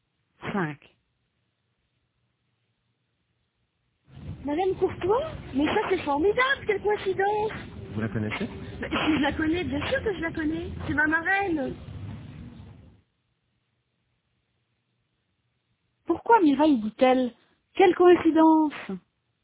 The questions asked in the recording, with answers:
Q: Pourquoi Mireille dit-elle? Quelle coïncidence!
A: Parce qu'elle connaît Madame Courtois.